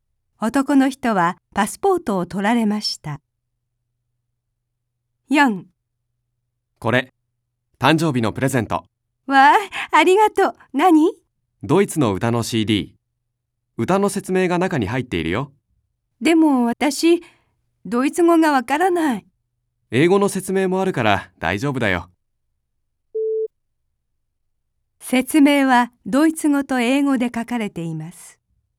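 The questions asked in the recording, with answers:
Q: 説明はドイツ語と英語で書かれています。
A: はい(正しい)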